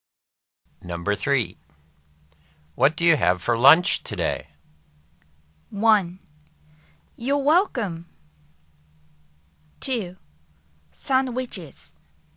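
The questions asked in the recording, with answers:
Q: What do you have for lunch today?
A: 2: Sandwiches.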